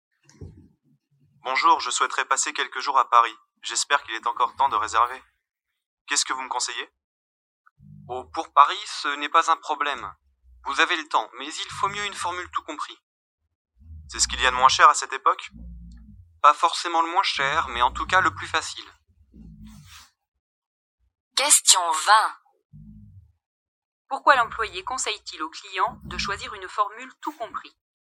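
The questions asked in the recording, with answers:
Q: Pourquoi l'employé conseille-t-il au client de choisir une formule tout compris ?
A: C'est le plus facile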